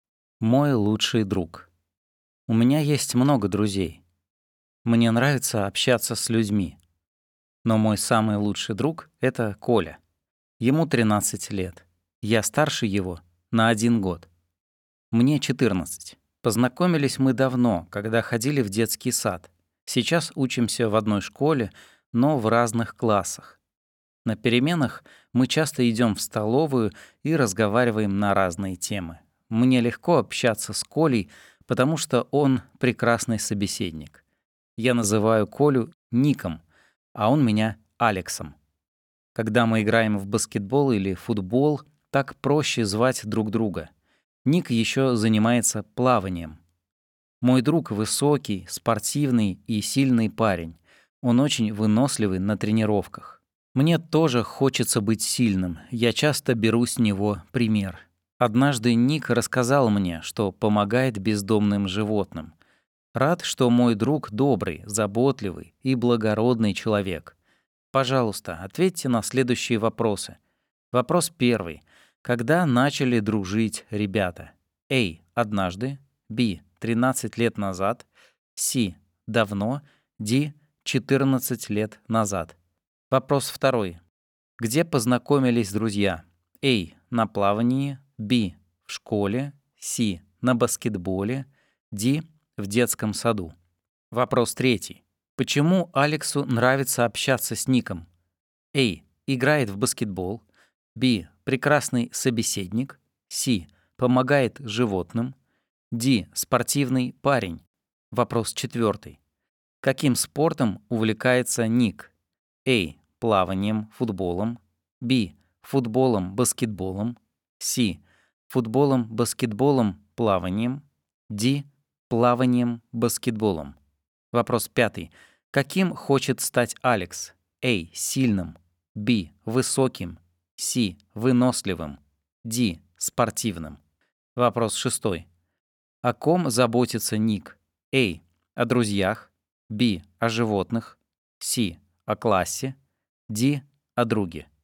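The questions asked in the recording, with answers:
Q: Когда начали дружить ребята?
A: C: Давно.

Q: Где познакомились друзья?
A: D: В детском саду.

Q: Почему Алексу нравится общаться с Ником?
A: B: Прекрасный собеседник.

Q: Каким спортом увлекается Ник?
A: C: Футболом, баскетболом, плаванием.

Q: Каким хочет стать Алекс?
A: А: Сильным.

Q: О ком заботится Ник?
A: Б: О животных.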